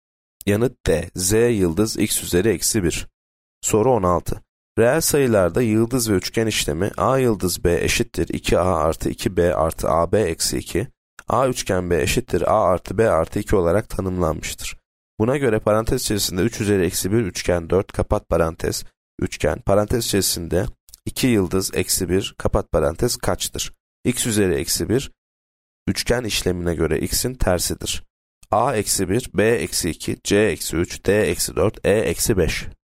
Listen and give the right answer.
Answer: Yanıt A eksi 1.